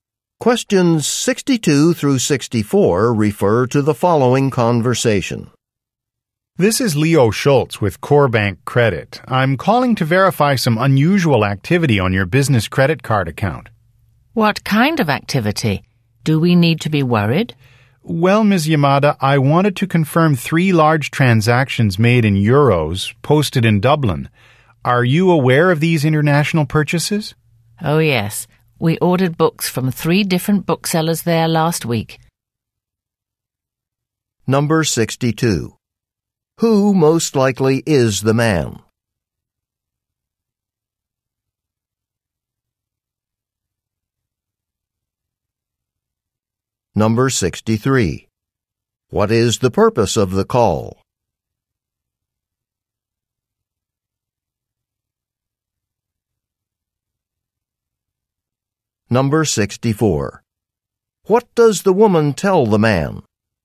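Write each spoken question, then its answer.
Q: Who most likely is the man?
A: A credit card company employee

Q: What is the purpose of the call?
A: To verify unusual activity on a credit card account

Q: What does the woman tell the man?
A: They ordered books from booksellers in Dublin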